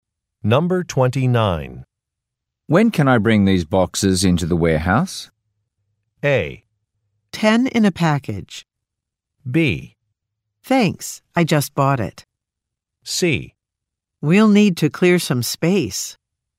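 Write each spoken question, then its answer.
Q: When can I bring these boxes into the warehouse?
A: C: We'll need to clear some space.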